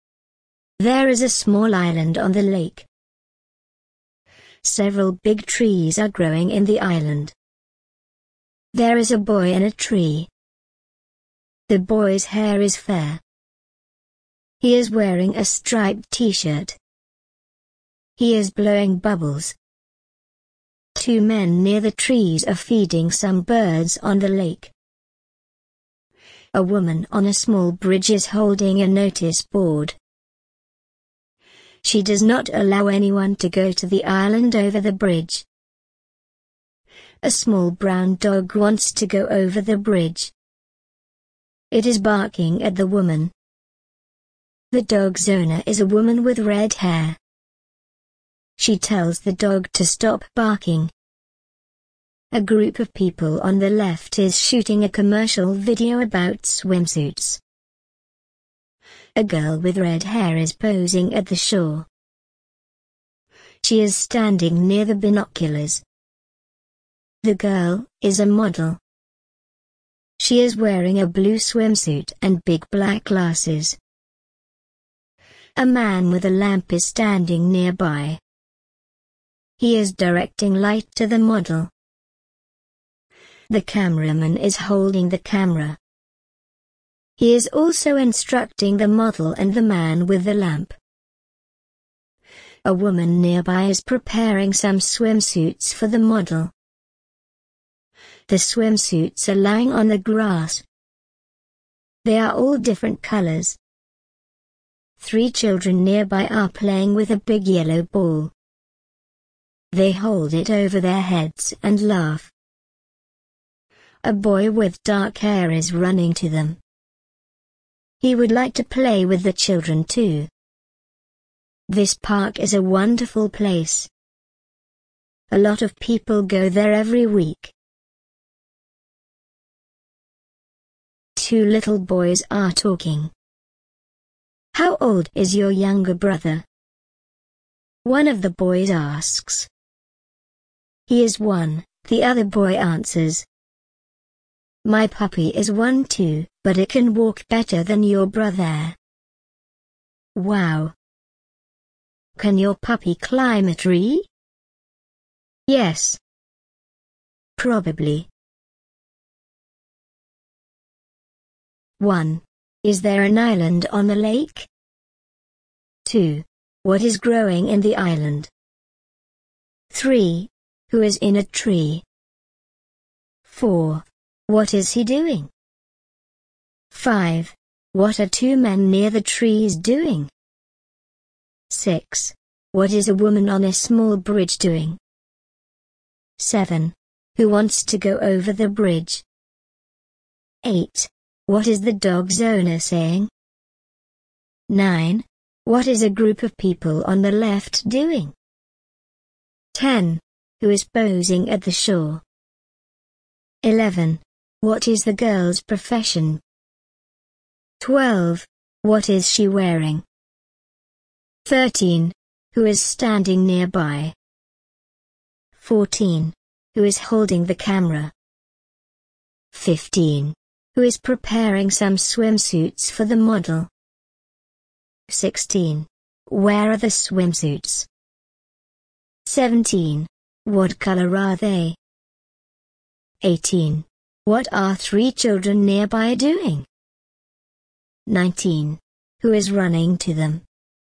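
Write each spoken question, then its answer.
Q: Is there an island on the lake?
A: Yes, there is a small island on the lake.

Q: What is growing in the island?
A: Several big trees

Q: Who is in a tree?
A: A boy with fair hair in a striped t-shirt

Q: What is he doing?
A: Blowing bubbles

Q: What are two men near the trees doing?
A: Feeding some birds on the lake

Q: What is a woman on a small bridge doing?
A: Holding a notice board and not allowing anyone onto the island

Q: Who wants to go over the bridge?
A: A small brown dog

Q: What is the dog's owner saying?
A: She tells the dog to stop barking.

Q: What is a group of people on the left doing?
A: Shooting a commercial video about swimsuits

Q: Who is posing at the shore?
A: A girl with red hair

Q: What is the girl's profession?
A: She is a model.

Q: What is she wearing?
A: A blue swimsuit and big black glasses

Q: Who is standing nearby?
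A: A man with a lamp

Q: Who is holding the camera?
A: The cameraman

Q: Who is preparing some swimsuits for the model?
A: A woman nearby

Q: Where are the swimsuits?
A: On the grass

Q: What color are they?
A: They are all different colors.

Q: What are three children nearby doing?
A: Playing with a big yellow ball

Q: Who is running to them?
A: A boy with dark hair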